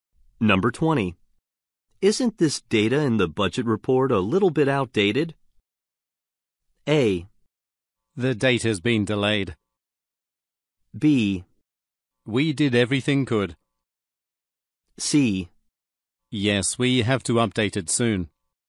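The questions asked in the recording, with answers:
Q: Isn't this data in the budget report a little bit outdated?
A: C: Yes, we have to update it soon.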